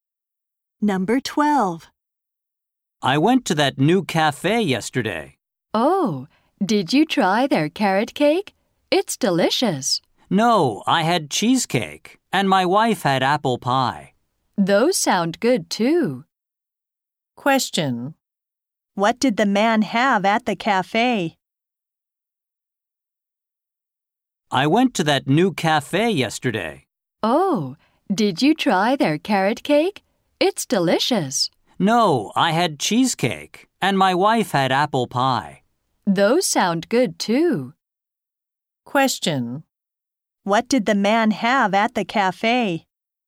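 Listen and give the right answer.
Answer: Cheesecake.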